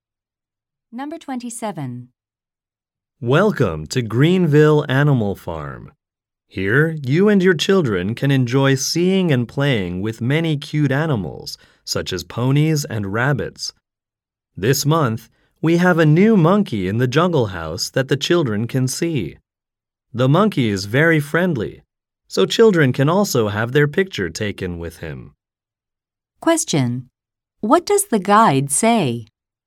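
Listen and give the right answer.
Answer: Children can have their picture taken with a new monkey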